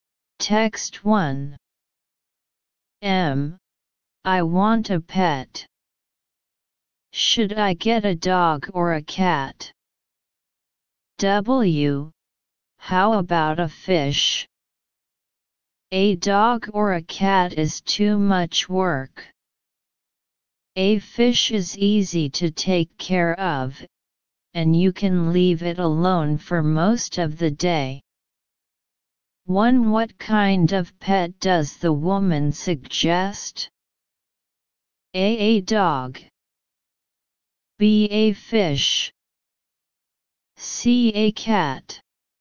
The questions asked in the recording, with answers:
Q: What kind of pet does the woman suggest?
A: Answer, B.